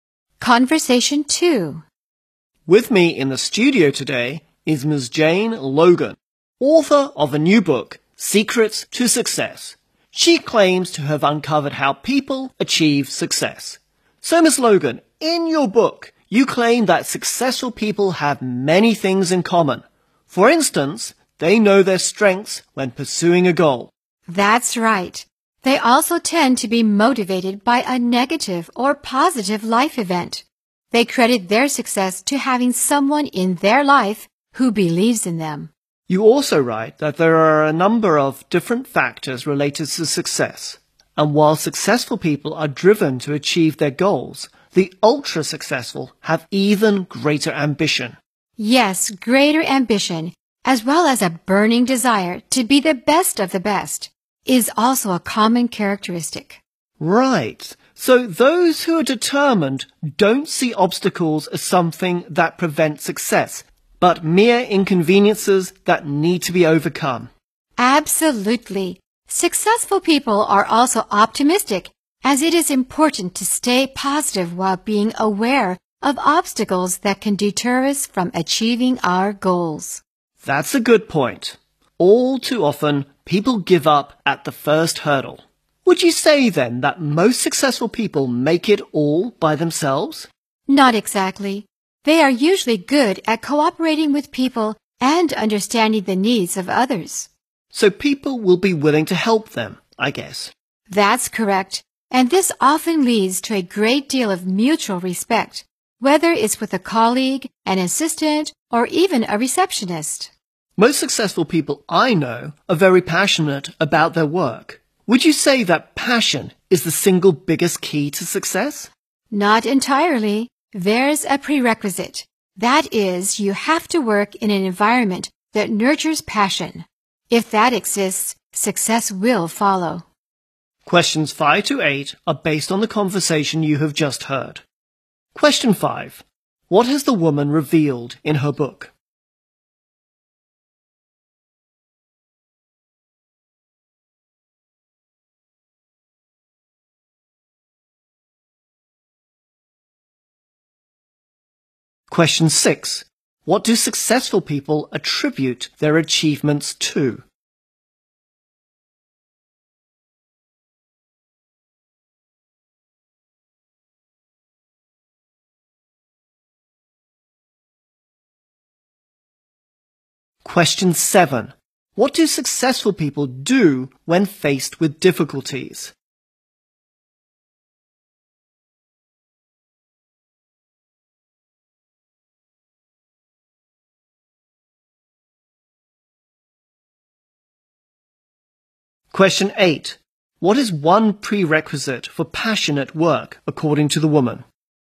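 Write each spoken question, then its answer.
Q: What has the woman revealed in her book?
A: Successful people have many things in common

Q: What do successful people attribute their achievements to?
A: Having someone in their life who believes in them

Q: What do successful people do when faced with difficulties?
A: They treat obstacles as mere inconveniences to be overcome

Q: What is one prerequisite for passionate work, according to the woman?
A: An environment that nurtures passion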